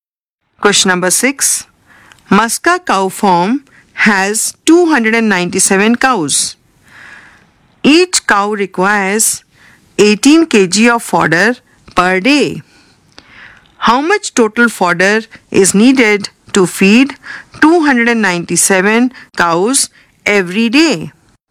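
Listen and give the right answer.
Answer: 5346 kg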